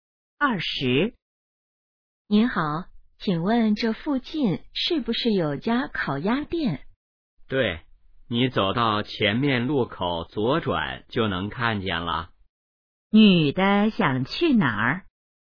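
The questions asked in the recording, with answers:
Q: 女的想去哪儿?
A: 烤鸭店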